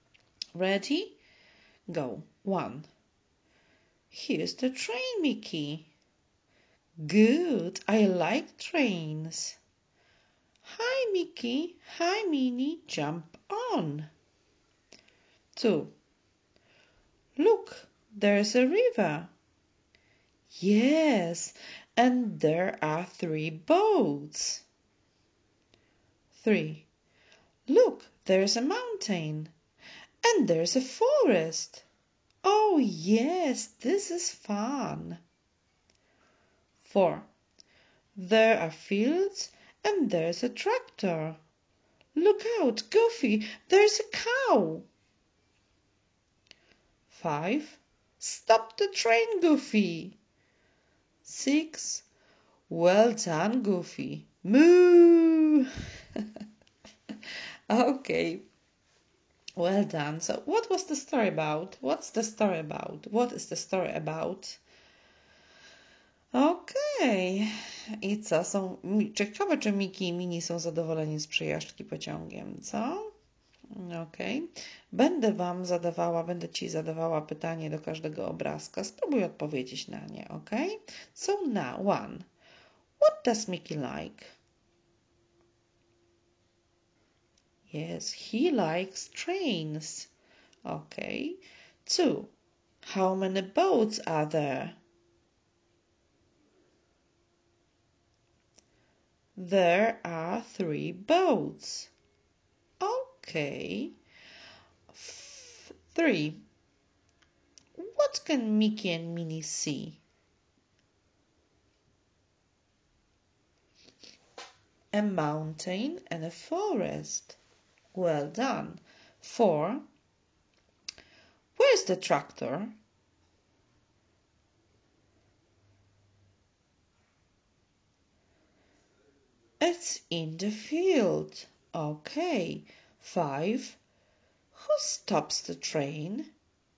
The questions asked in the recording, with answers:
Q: What does Mickey like?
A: Yes, he likes trains.

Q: How many boats are there?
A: There are 3 boats.

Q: What can Mickey and Minnie see?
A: A mountain and a forest.

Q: Who stops the train?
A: Goofy, yes.